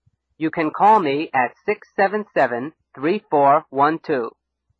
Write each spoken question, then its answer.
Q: Where can you call me?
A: at 677-3412. You can call me at 677-3412.